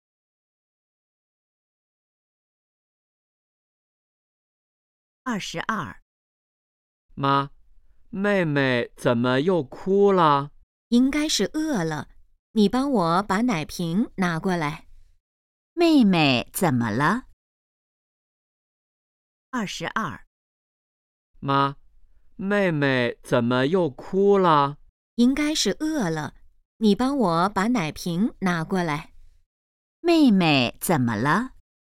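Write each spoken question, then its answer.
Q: 妹妹怎么了?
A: 饿了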